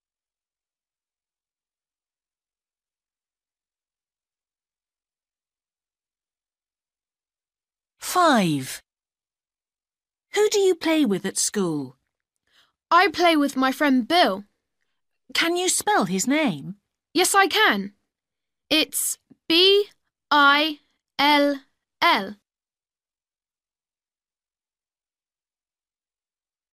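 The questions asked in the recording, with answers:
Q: Who do you play with at school?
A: Bill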